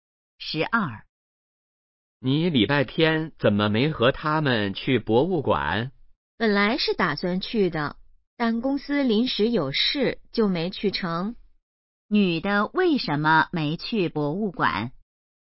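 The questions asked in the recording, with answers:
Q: 女的为什么没去博物馆?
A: 公司临时有事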